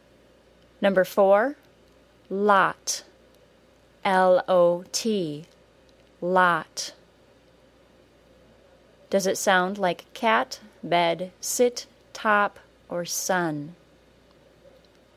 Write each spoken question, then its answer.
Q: Does it sound like cat, bed, sit, top, or sun?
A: Lot is the short O, like the word top.